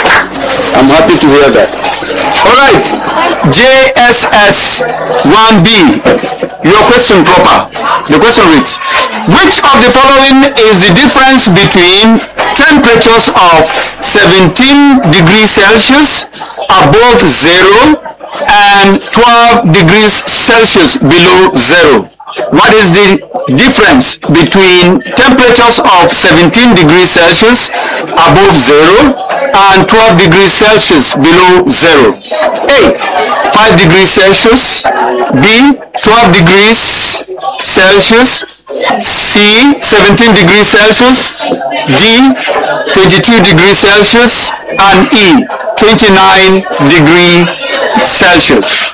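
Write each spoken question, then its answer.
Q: which of the following is the difference between temperatures of 17 degrees Celsius above zero and 12 degrees Celsius below zero?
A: E: 29 degrees Celsius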